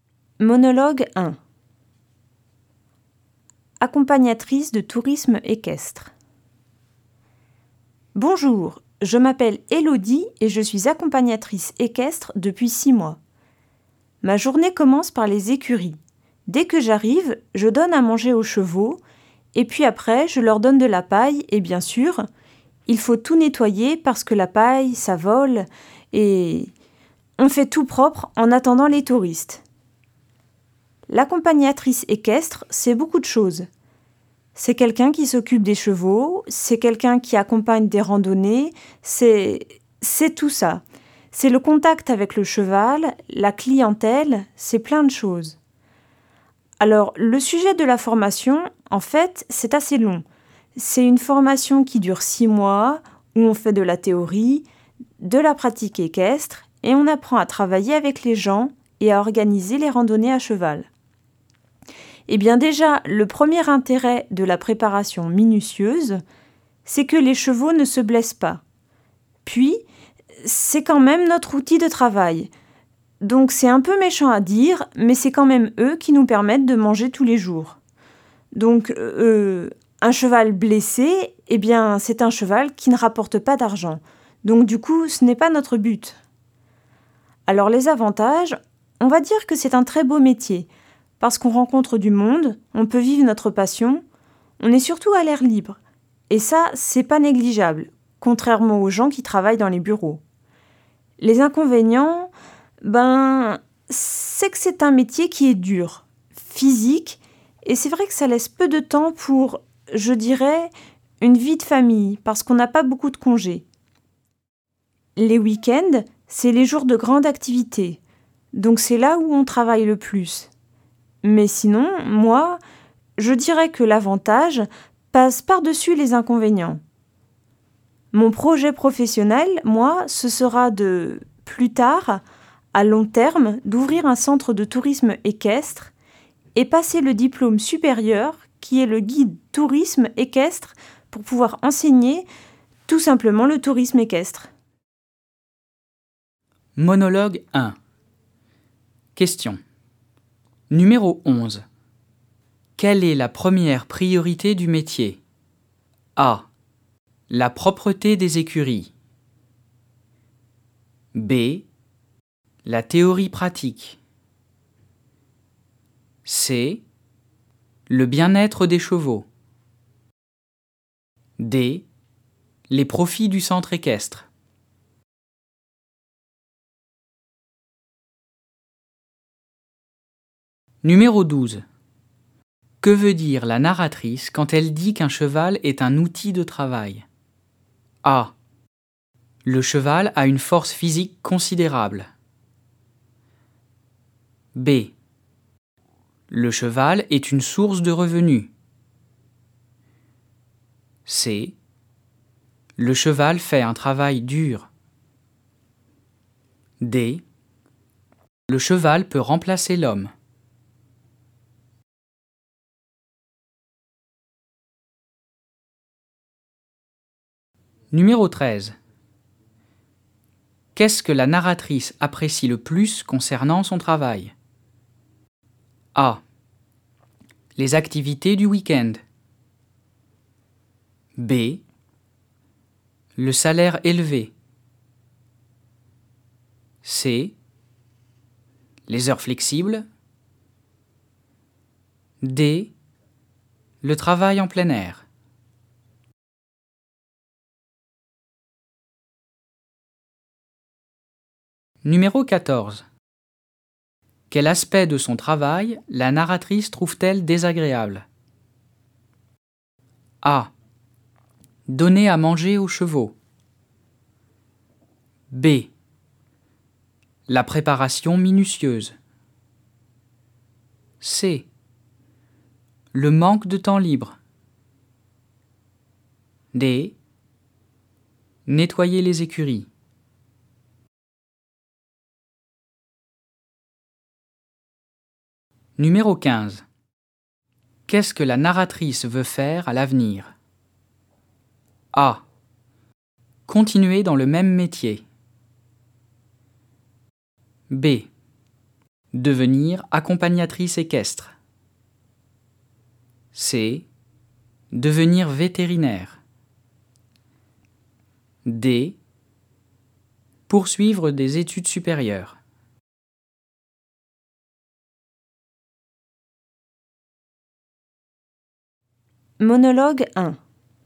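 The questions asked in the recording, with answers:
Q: Quelle est la première priorité du métier?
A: C: Le bien-être des chevaux.

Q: Que veut dire la narratrice quand elle dit qu'un cheval est un outil de travail?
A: B: Le cheval est une source de revenus.

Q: Qu'est-ce que la narratrice apprécie le plus concernant son travail?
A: D: Le travail en plein air.

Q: Quel aspect de son travail la narratrice trouve-t-elle désagréable?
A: C: Le manque de temps libre.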